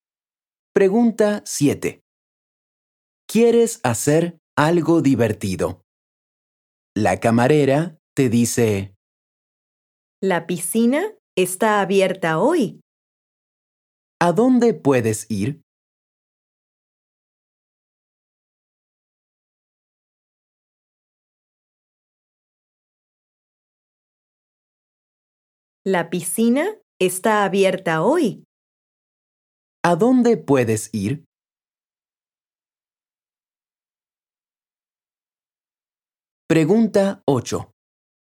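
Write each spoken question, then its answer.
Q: ¿A dónde puedes ir?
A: a la piscina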